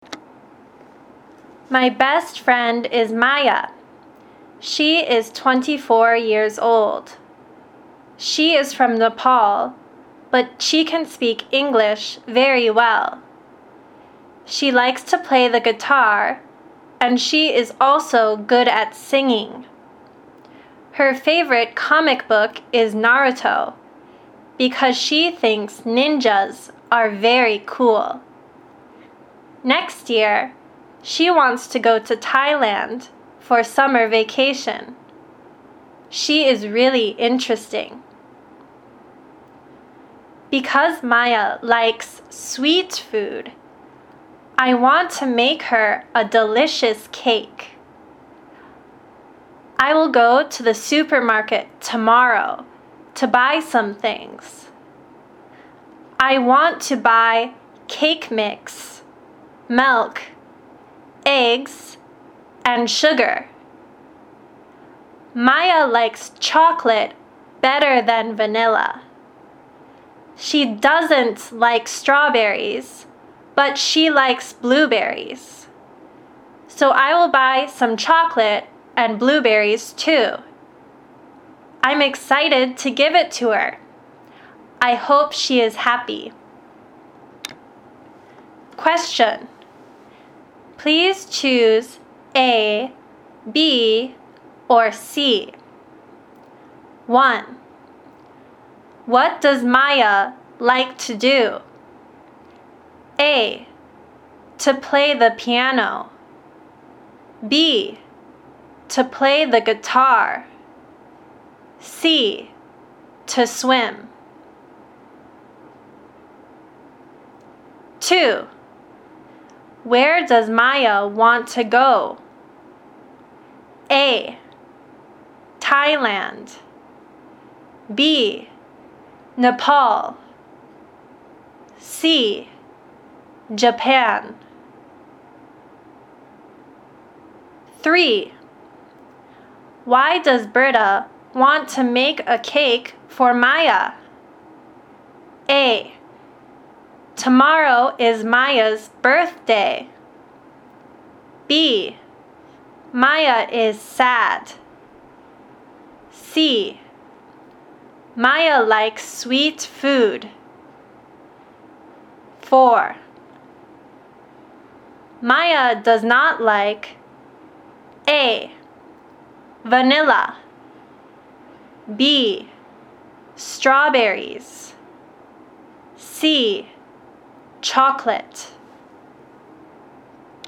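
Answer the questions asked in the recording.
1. B: To play the guitar.
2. A: Thailand.
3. C: Maya likes sweet food.
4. B: Strawberries.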